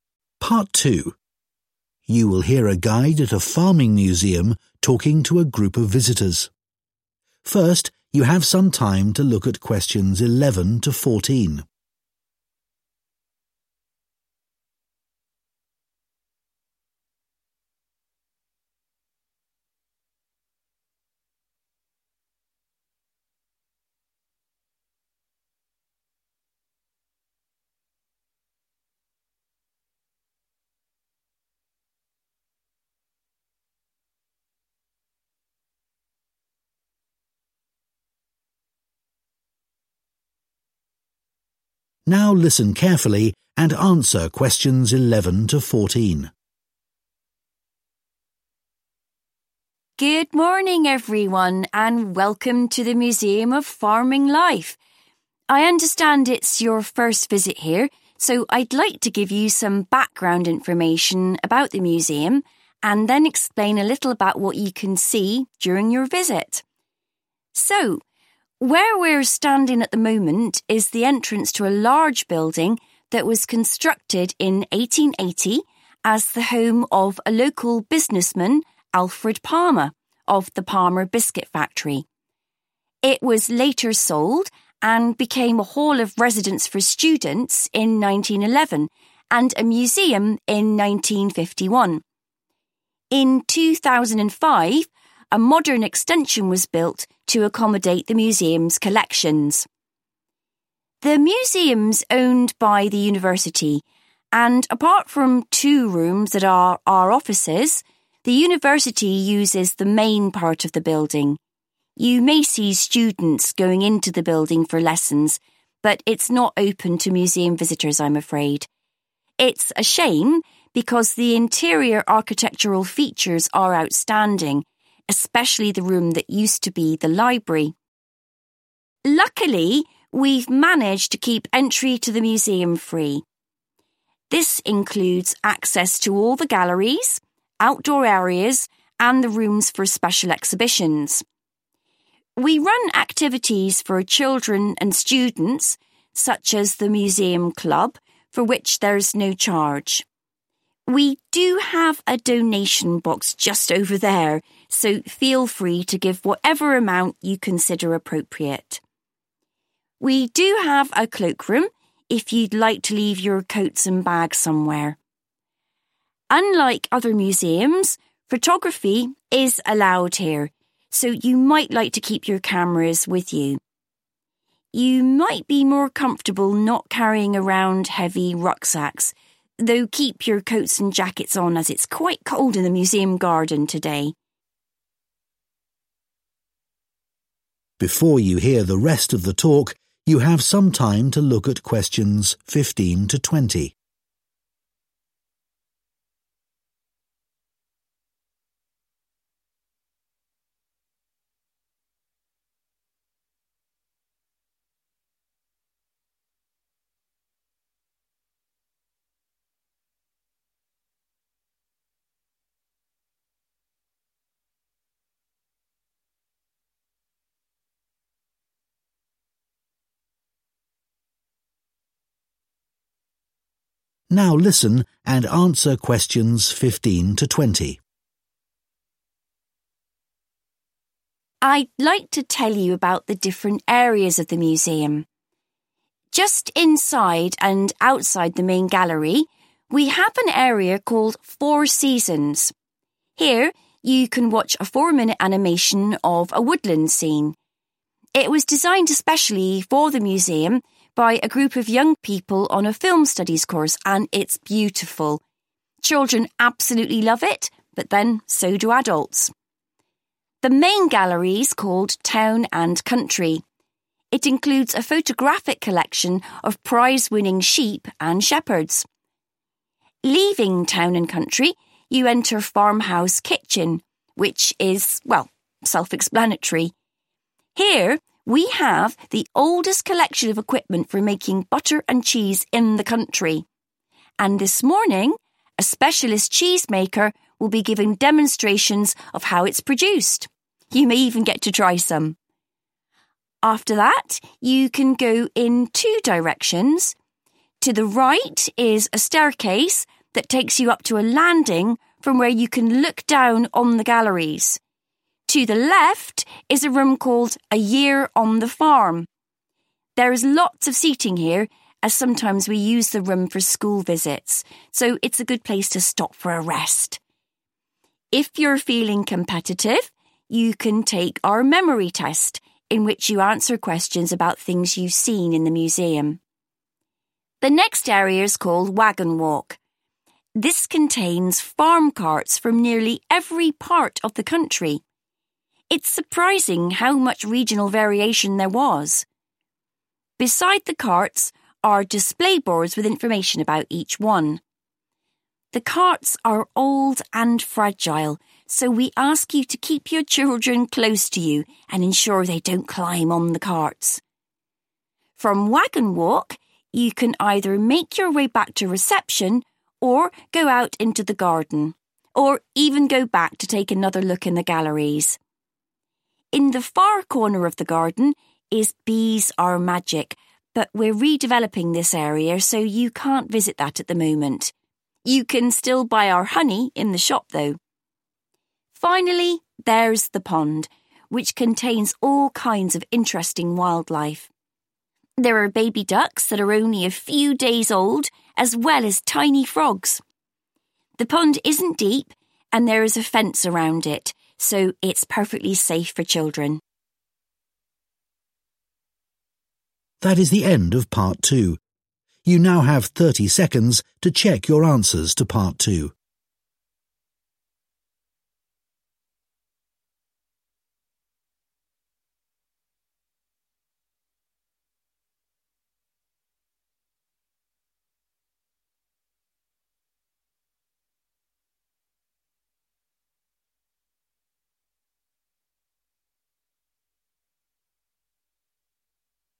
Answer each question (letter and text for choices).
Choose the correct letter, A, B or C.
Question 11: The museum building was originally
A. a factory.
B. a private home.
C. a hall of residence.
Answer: B. a private home.

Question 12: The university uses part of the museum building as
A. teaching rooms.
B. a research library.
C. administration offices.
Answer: A. teaching rooms.

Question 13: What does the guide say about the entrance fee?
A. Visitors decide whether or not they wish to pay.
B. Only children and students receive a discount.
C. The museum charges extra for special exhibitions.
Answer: A. Visitors decide whether or not they wish to pay.

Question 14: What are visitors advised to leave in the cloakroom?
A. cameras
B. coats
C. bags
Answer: C. bags

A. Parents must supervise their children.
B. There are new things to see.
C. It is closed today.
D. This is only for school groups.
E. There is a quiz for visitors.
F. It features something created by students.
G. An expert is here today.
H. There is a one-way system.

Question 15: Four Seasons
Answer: F. It features something created by students.

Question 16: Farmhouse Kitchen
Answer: G. An expert is here today.

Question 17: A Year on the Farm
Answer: E. There is a quiz for visitors.

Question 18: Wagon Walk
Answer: A. Parents must supervise their children.

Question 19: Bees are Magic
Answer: C. It is closed today.

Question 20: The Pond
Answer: B. There are new things to see.